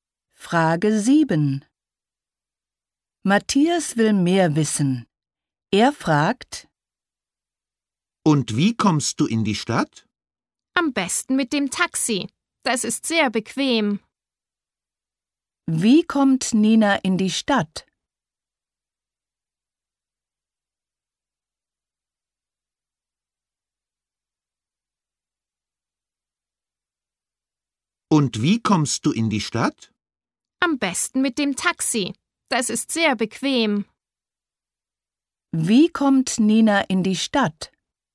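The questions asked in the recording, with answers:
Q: Wie kommt Nina in die Stadt?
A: Mit dem Taxi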